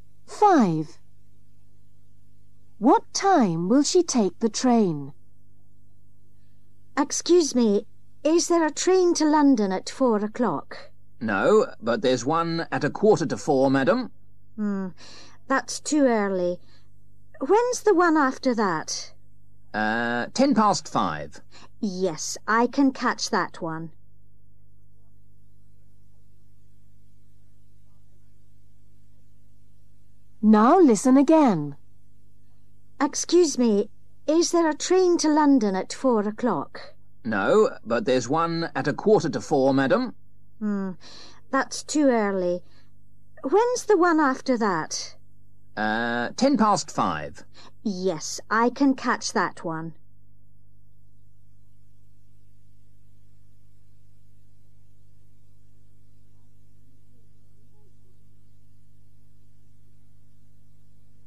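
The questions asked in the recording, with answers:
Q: What time will she take the train?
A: 5:10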